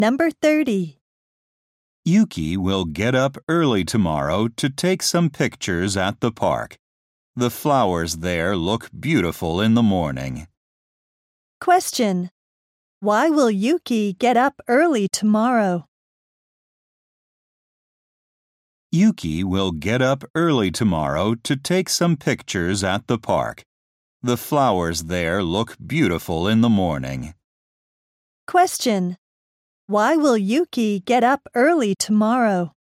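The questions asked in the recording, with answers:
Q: Why will Yuki get up early tomorrow?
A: To take some pictures at the park.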